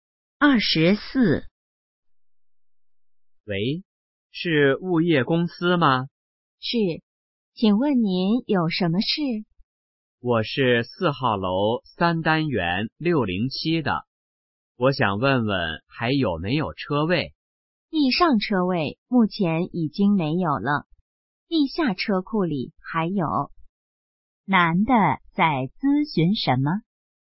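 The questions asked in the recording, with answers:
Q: 男的在咨询什么?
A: 还有没有车位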